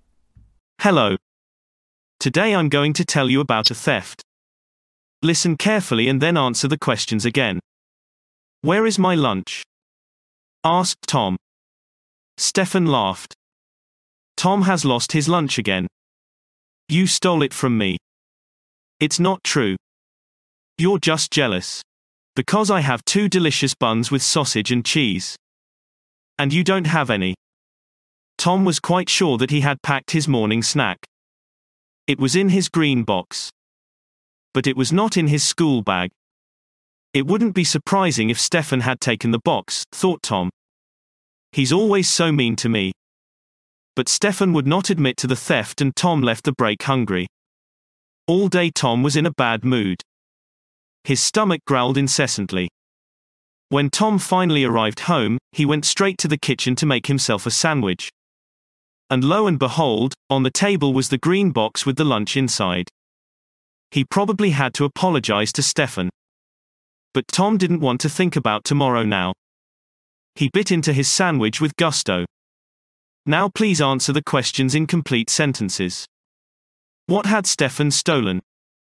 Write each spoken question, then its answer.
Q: What had Stefan stolen?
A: Stefan did not steal anything at all, but was falsely accused of stealing.